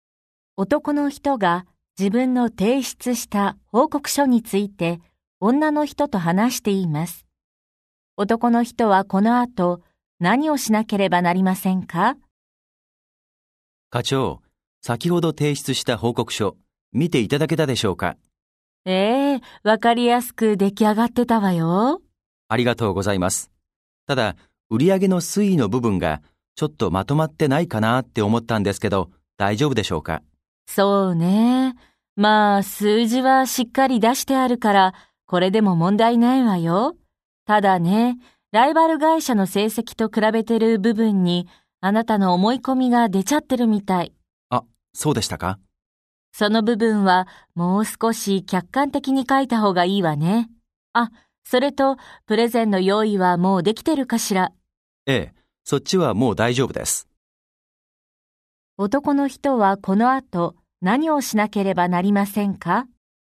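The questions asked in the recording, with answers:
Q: 男の人はこの後、何をしなければなりませんか?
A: 報告書のライバル会社と比べている部分を、もっと客観的に書き直す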